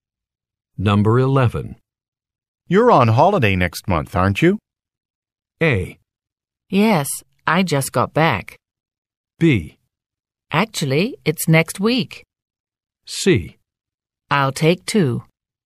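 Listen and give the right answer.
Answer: B: Actually, it's next week.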